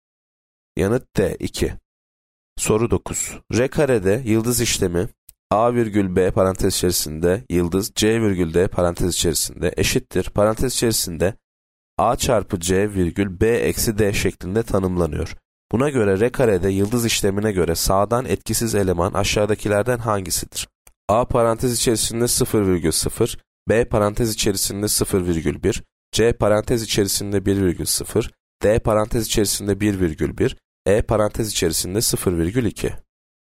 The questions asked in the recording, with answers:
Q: Buna göre R karede yıldız işlemine göre sağdan etkisiz eleman aşağıdakilerden hangisidir?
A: Yanıt C parantez içerisinde 1 virgül 0.